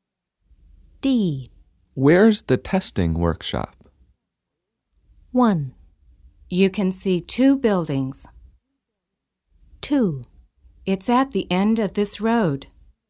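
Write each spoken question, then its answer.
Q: Where's the testing workshop?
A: 2: It's at the end of this road.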